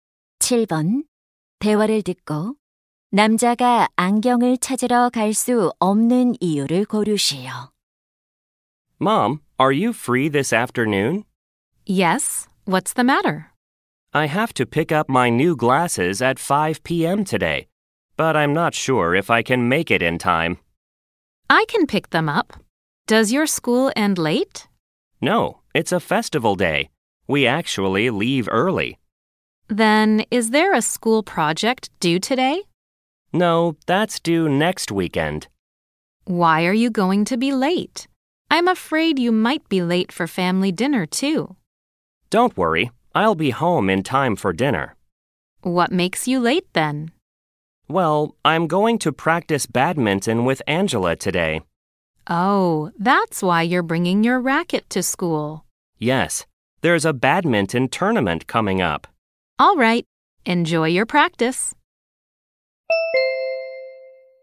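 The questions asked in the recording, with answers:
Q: 대화를 듣고 남자가 안경을 찾으러 갈 수 없는 이유를 고르시오.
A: Angela와 배드민턴 연습을 해야 해서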